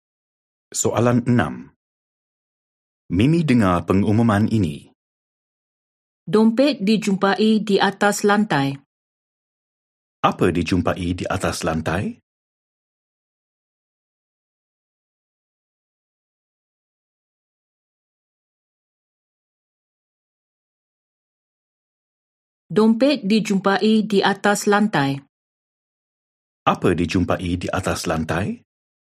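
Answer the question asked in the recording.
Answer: dompet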